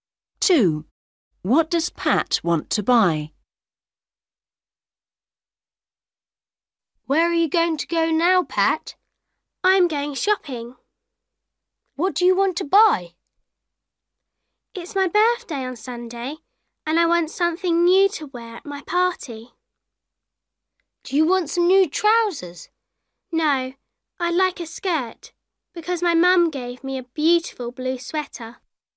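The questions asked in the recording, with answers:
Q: What does Pat want to buy?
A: A skirt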